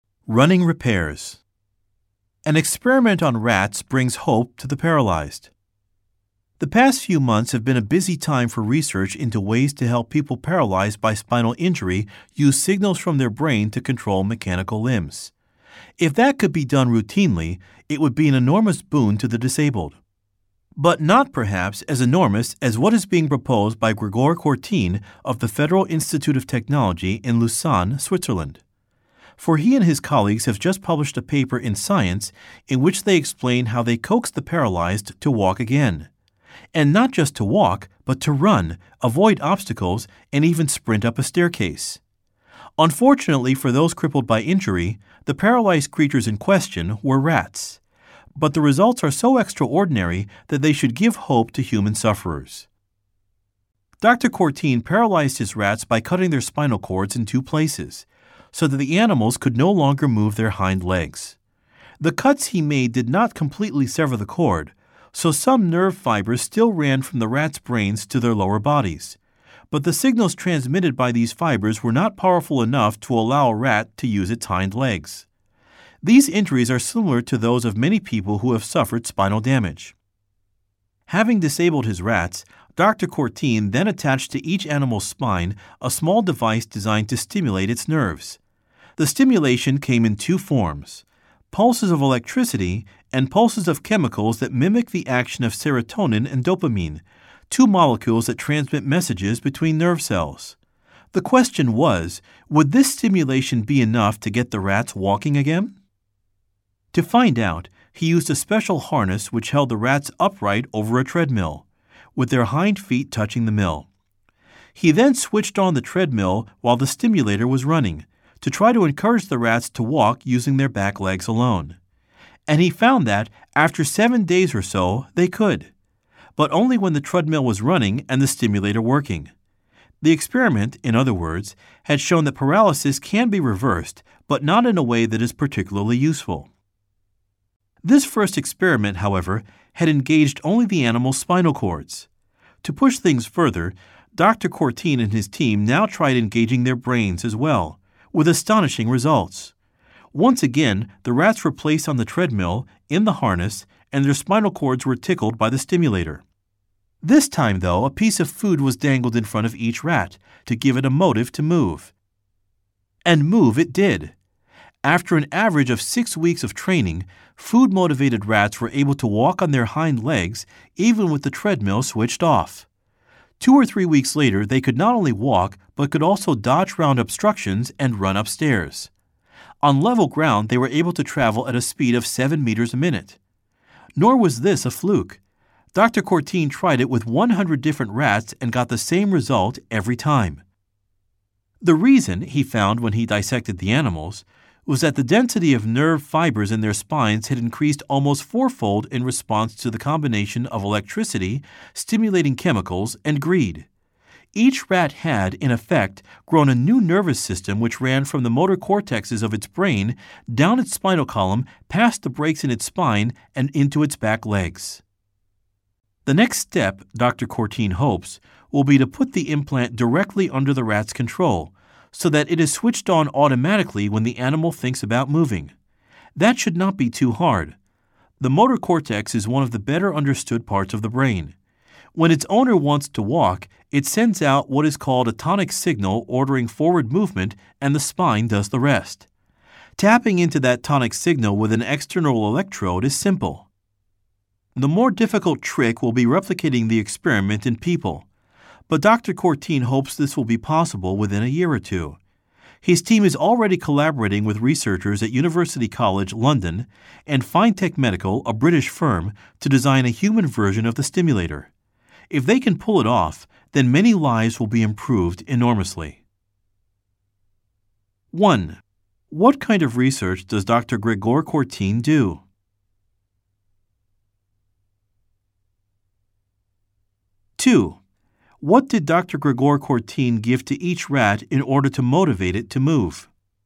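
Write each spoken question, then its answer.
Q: What did Dr. Gregor Courtine give to each rat in order to motivate it to move?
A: A piece of food dangled in front of it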